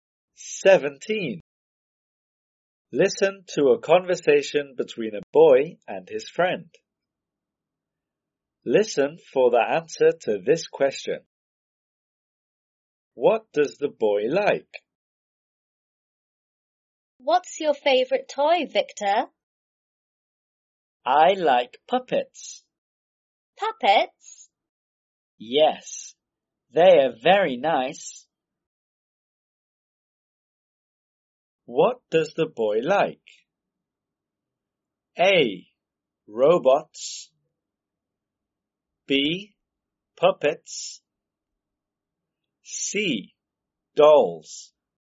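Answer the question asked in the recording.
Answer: B: Puppets.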